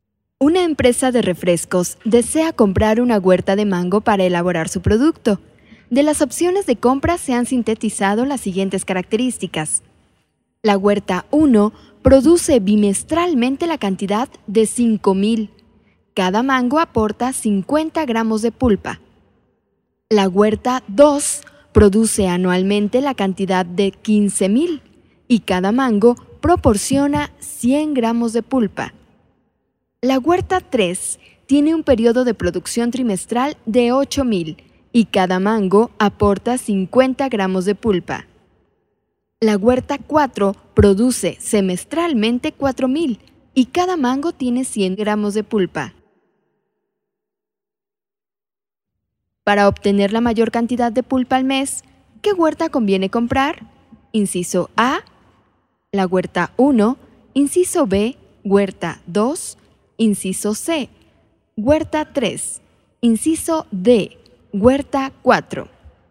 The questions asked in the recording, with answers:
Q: Para obtener la mayor cantidad de pulpa al mes, ¿qué huerta conviene comprar?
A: La respuesta correcta es la letra C.